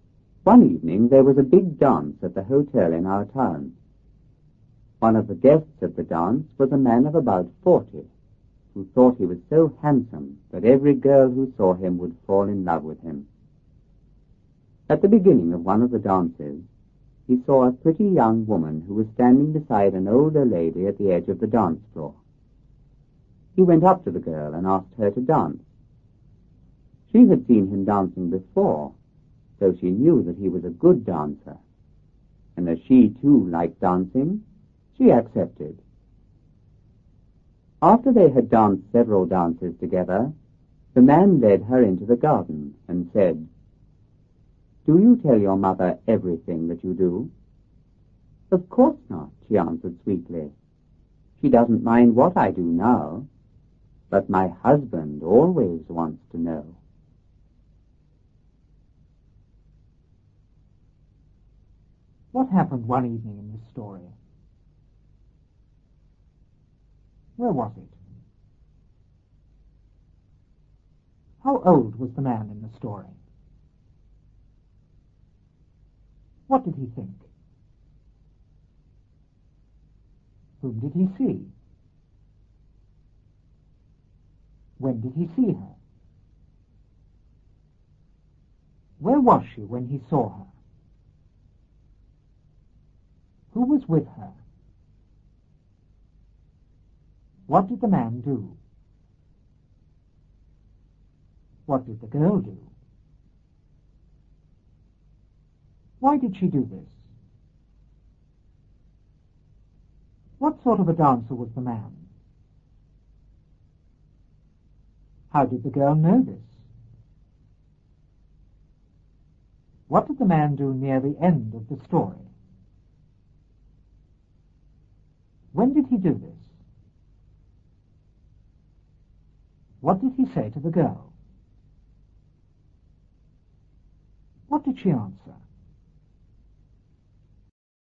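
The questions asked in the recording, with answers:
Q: What happened one evening in this story?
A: There was a big dance at the hotel in town.

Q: Where was it?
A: At the hotel in the town.

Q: How old was the man in the story?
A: About 40.

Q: What did he think?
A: That he was so handsome every girl who saw him would fall in love with him.

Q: Whom did he see?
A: A pretty young woman.

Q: When did he see her?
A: At the beginning of one of the dances.

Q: Where was she when he saw her?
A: At the edge of the dance floor.

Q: Who was with her?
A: An older lady.

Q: What did the man do?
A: He went up to the girl and asked her to dance.

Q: What did the girl do?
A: She accepted.

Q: Why did she do this?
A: She knew he was a good dancer and she liked dancing too.

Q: What sort of a dancer was the man?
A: A good dancer.

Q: How did the girl know this?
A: She had seen him dancing before.

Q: What did the man do near the end of the story?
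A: He led her into the garden.

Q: When did he do this?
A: After they had danced several dances together.

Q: What did he say to the girl? What did she answer?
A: He asked if she told her mother everything she did; she said her mother didn't mind but her husband always wanted to know.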